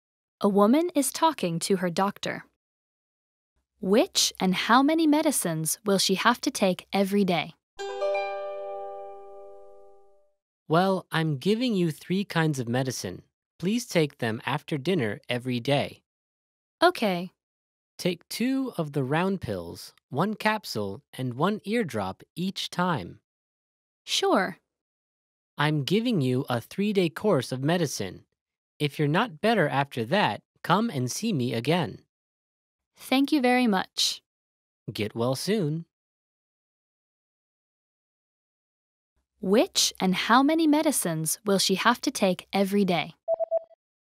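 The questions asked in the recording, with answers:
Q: Which and how many medicines will she have to take every day?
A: 2 round pills, 1 capsule and 1 eardrop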